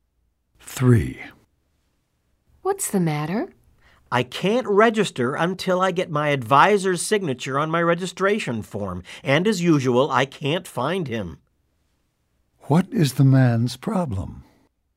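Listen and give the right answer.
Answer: He can't register because he can't find his advisor to sign his form.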